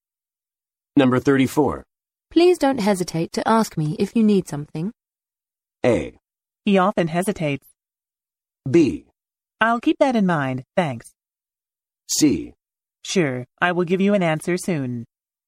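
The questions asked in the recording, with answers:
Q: Please don't hesitate to ask me if you need something.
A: B: I'll keep that in mind, thanks.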